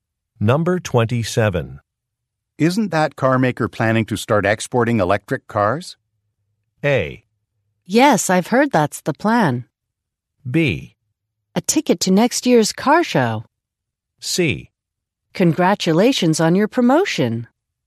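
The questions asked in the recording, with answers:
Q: Isn't that car maker planning to start exporting electric cars?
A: A: Yes, I've heard that's the plan.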